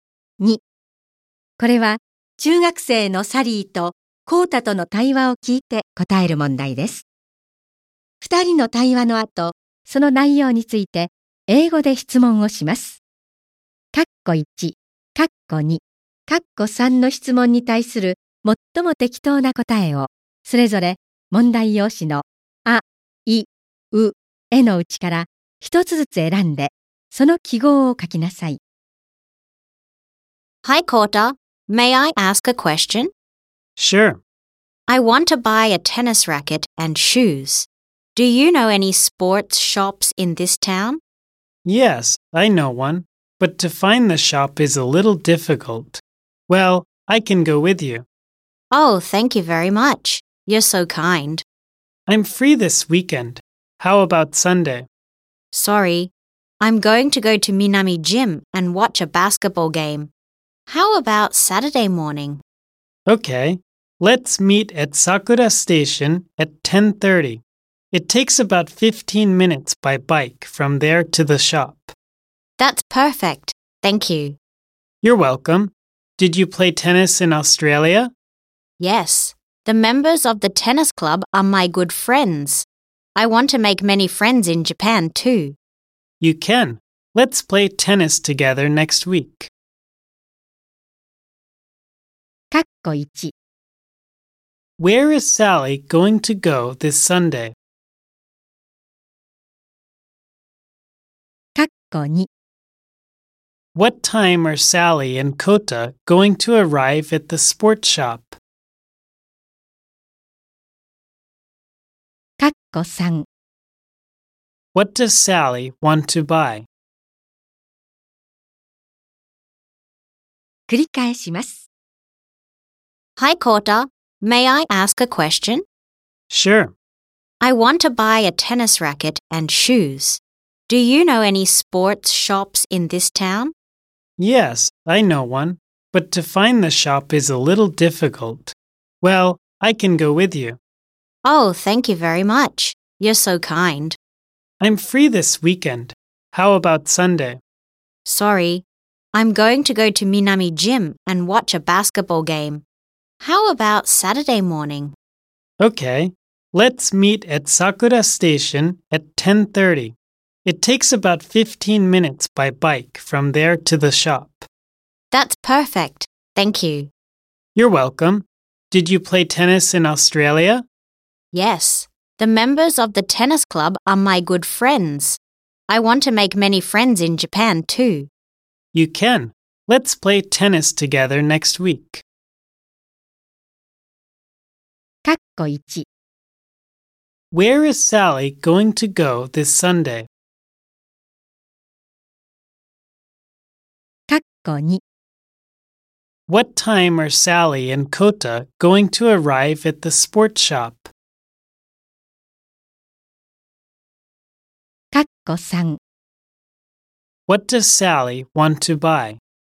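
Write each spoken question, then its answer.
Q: Where is Sally going to go this Sunday?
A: To Minami Gym (to watch a basketball game)

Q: What time are Sally and Kota going to arrive at the sports shop?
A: At about 10:45

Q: What does Sally want to buy?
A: A tennis racket and shoes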